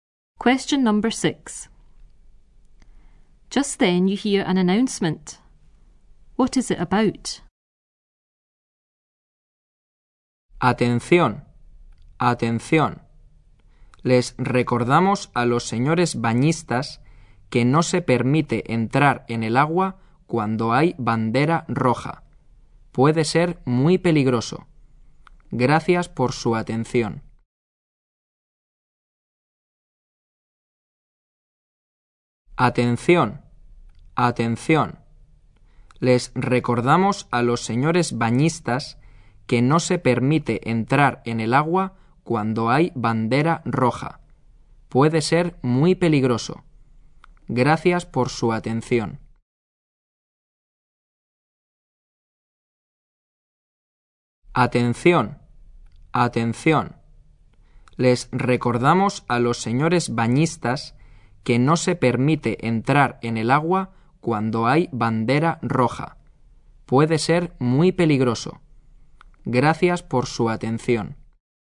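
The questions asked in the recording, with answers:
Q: What is it about?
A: No swimming when the red flag is flying; it can be dangerous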